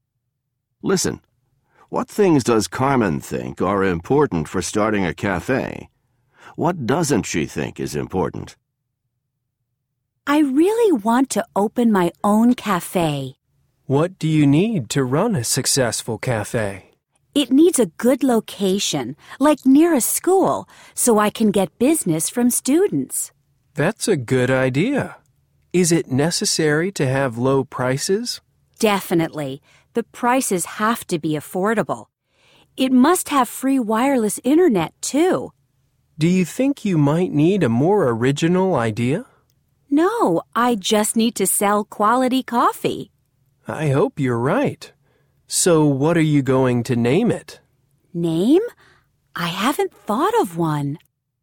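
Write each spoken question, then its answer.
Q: What things does Carmen think are important for starting a cafe?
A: A good location near a school, affordable prices, free wireless internet, and quality coffee

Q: What doesn't she think is important?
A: A more original idea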